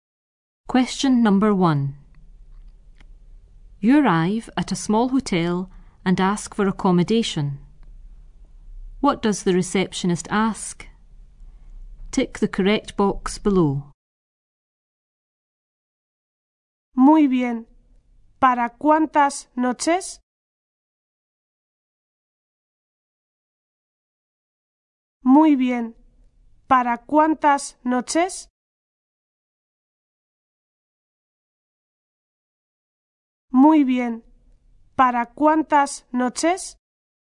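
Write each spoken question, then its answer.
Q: What does the receptionist ask?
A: How many nights you are staying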